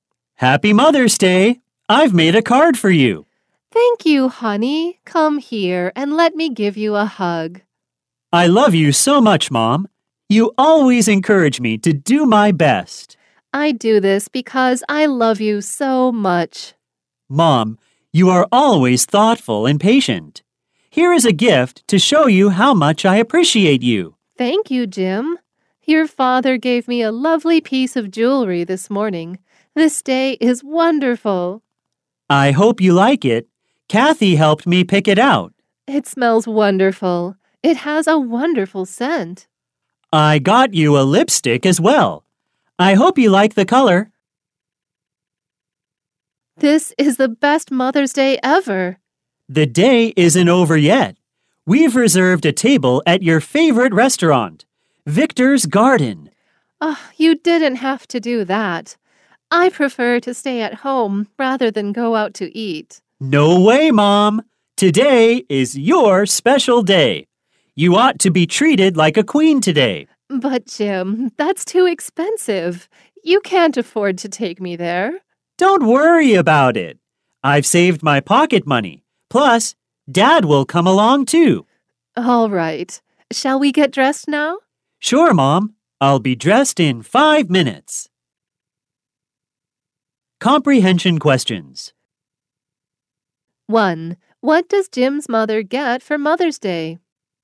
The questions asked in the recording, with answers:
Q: What does Jim's mother get for Mother's Day?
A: She gets a piece of jewelry, a bottle of perfume, and a lipstick.